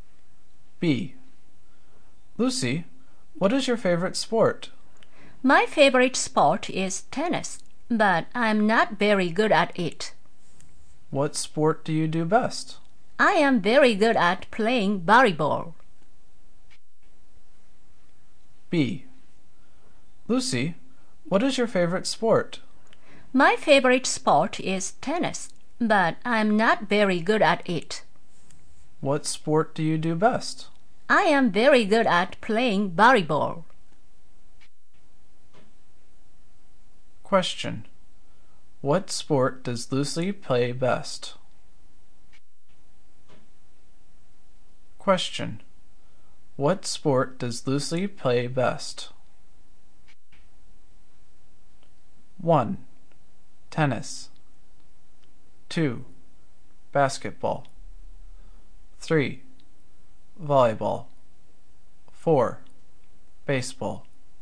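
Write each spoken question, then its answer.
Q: Question. What sport does Lucy play best?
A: 3: Volleyball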